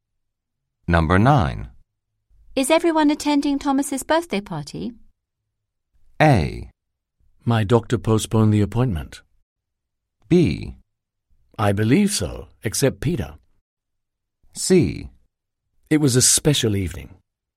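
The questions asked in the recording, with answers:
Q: Is everyone attending Thomas's birthday party?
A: B: I believe so, except Peter.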